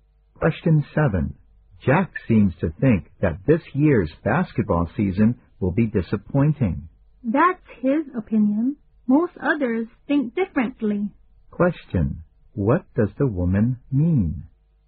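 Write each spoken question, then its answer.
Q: What does the woman mean?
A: Most people don't agree with Jack; they expect the season won't be disappointing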